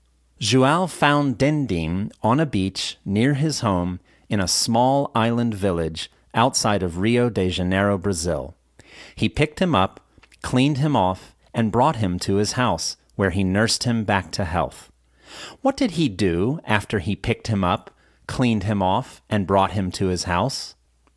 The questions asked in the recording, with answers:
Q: What did he do after he picked him up, cleaned him off, and brought him to his house?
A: After he picked him up, cleaned him off, and brought him to his house, he nursed him back to health.